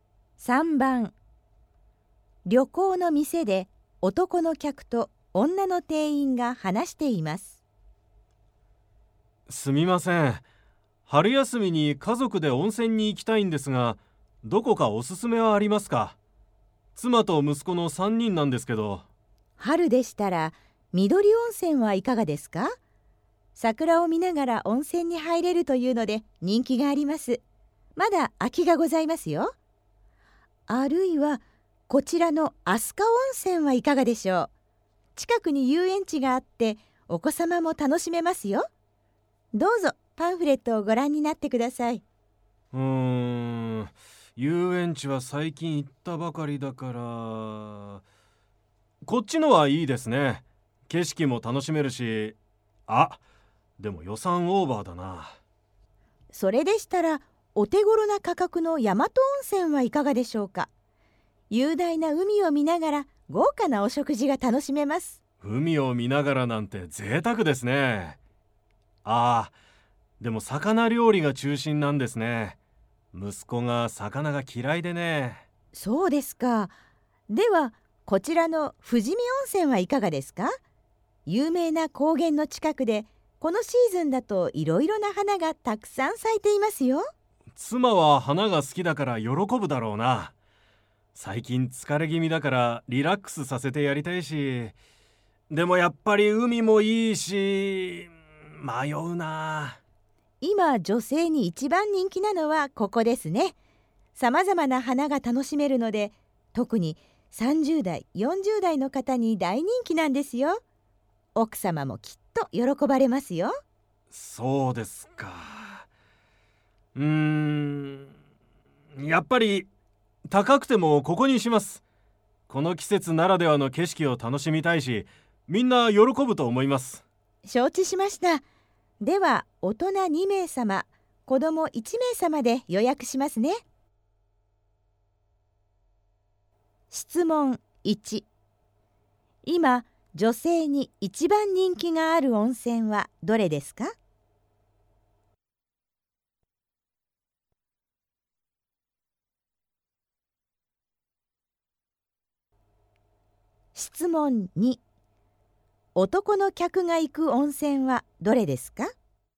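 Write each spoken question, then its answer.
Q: 今、女性に一番人気がある温泉はどれですか?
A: 富士見温泉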